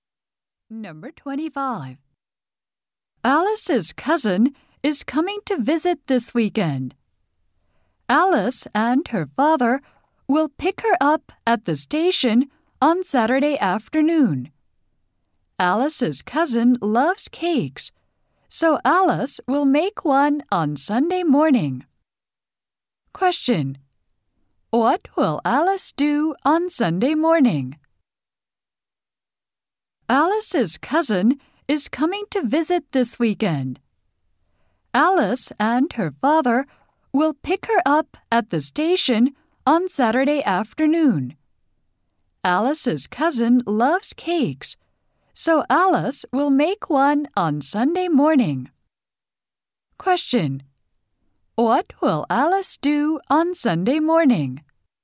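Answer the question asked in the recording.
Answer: Make a cake.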